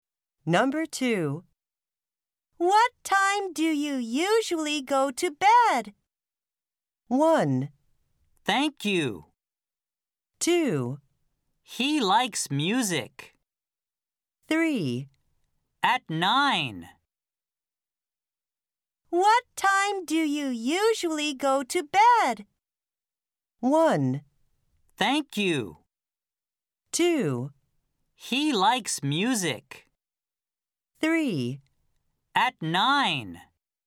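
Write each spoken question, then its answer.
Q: What time do you usually go to bed?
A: 3: At 9.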